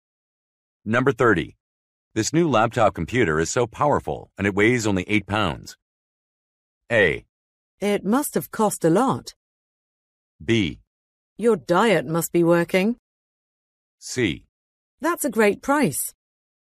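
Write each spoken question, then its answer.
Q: This new laptop computer is so powerful and it weighs only 8 pounds.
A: A: It must have cost a lot.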